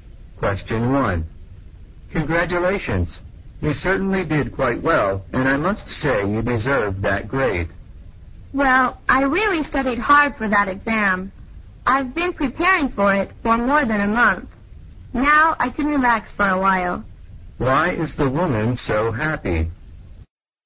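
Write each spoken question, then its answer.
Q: Why is the woman so happy?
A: She got a good grade on the exam she studied hard for.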